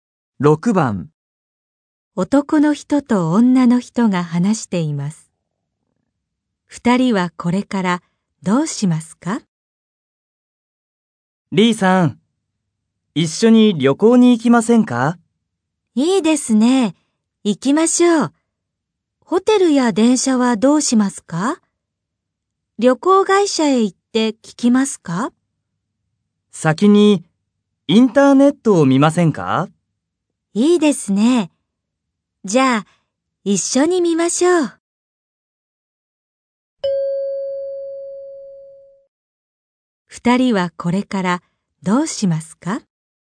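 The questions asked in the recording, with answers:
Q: 二人はこれからどうしますか?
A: 一緒にインターネットを見る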